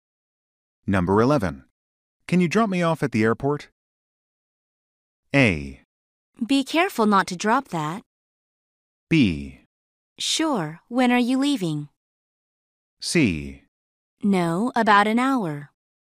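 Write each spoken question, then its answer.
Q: Can you drop me off at the airport?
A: B: Sure, when are you leaving?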